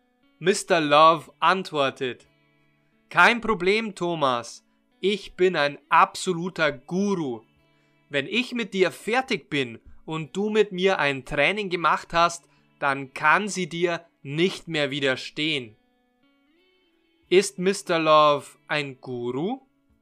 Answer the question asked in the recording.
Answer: Ja, das stimmt. Mr. Love ist ein absoluter Guru.